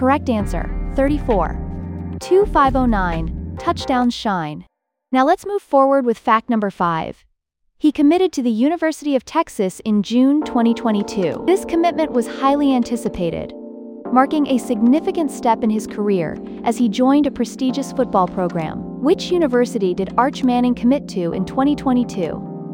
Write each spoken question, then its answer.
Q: Which university did Arch Manning commit to in 2022?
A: Correct answer, University of Texas.